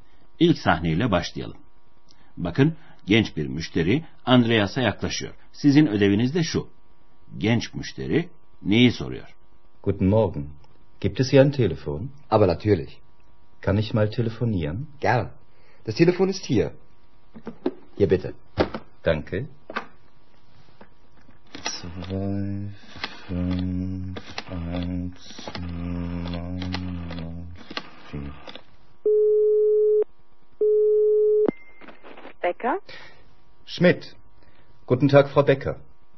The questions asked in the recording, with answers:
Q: Genç müşteri neyi soruyor?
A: Genç adamın telefonu sorduğunu anlamanız hiç de zor olmadı sanırım sevgili dinleyenler.